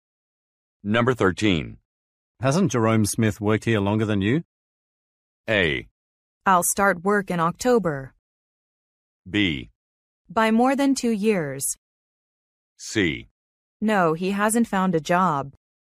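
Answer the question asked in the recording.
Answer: B: By more than 2 years.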